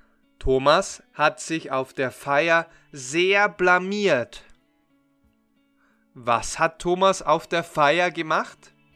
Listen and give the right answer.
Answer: Er hat sich blamiert.